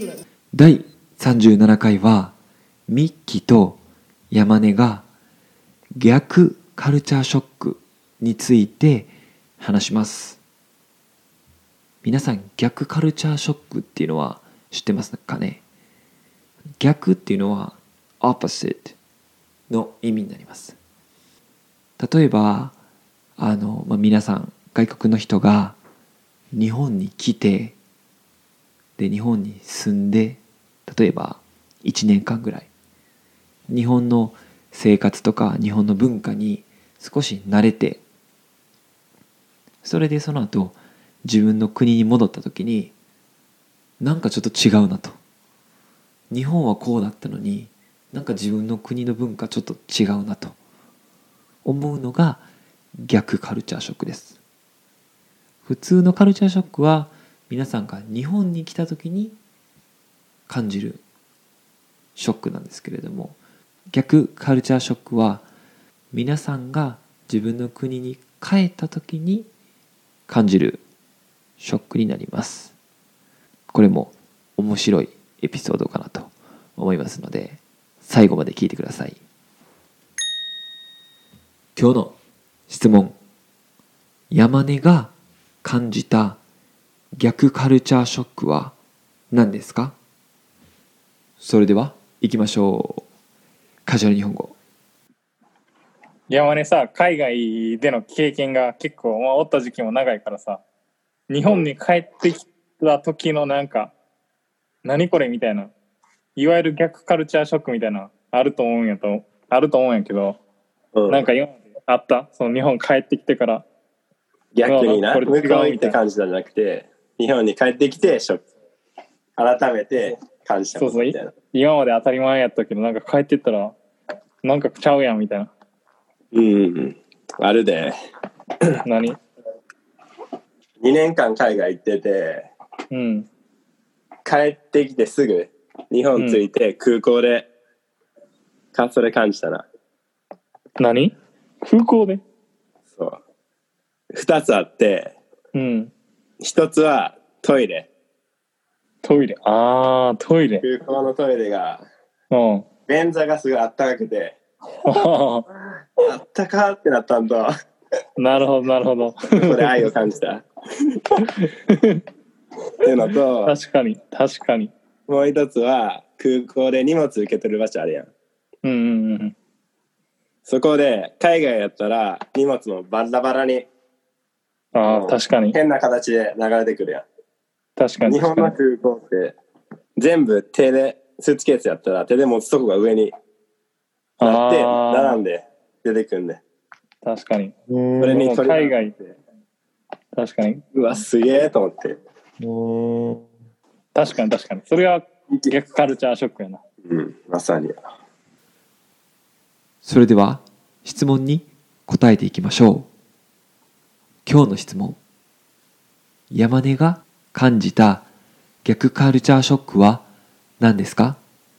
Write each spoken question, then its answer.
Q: 今日の質問、山根が感じた逆カルチャーショックは何ですか?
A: 1つ目が空港のトイレで感じたと言ってますね。